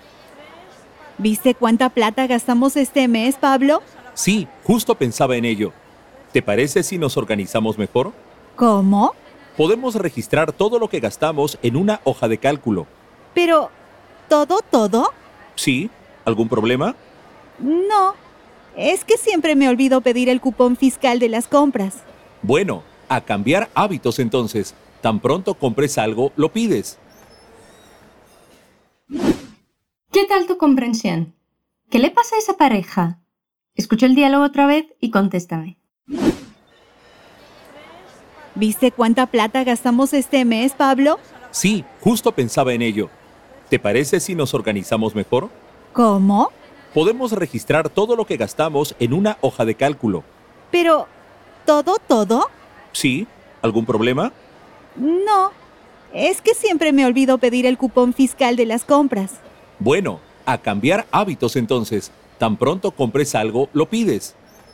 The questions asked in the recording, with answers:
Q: ¿Qué le pasa a esa pareja?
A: los dos hablan cómo piensan empezar a ordenar sus finanzas, ¿verdad?